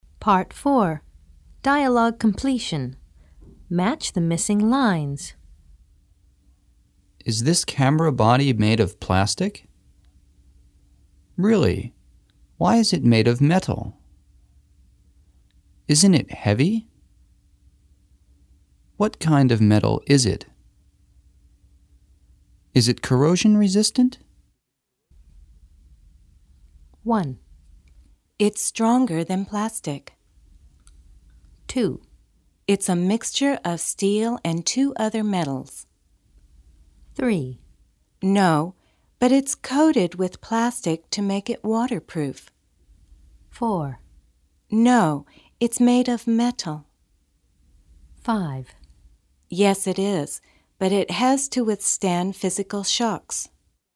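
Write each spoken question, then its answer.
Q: Is this camera body made of plastic?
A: 4: No, it's made of metal.

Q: Really? Why is it made of metal?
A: 1: It's stronger than plastic.

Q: Isn't it heavy?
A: 5: Yes, it is, but it has to withstand physical shocks.

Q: What kind of metal is it?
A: 2: It's a mixture of steel and two other metals.

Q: Is it corrosion resistant?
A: 3: No, but it's coated with plastic to make it waterproof.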